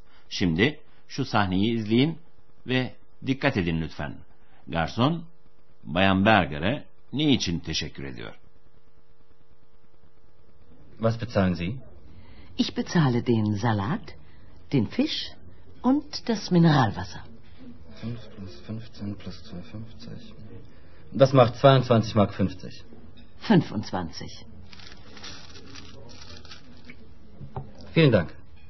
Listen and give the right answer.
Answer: garson verdiği bahşiş için Bayan Berger'a teşekkür etti.